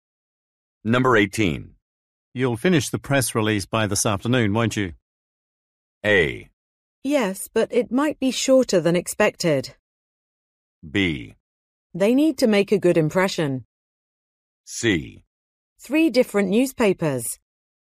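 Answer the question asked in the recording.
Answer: A: Yes, but it might be shorter than expected.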